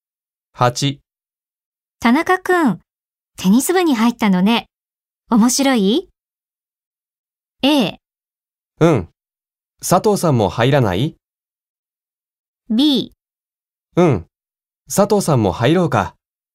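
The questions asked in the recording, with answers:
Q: 田中くん、テニス部に入ったのね。面白い?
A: A: うん、佐藤さんも入らない?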